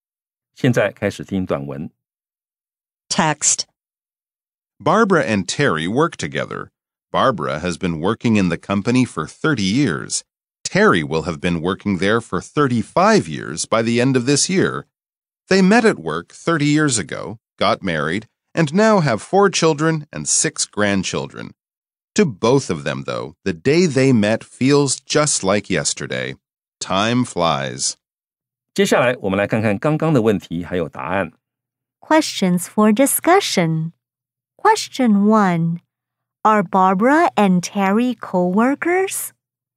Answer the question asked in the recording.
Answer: Yes, they are co-workers.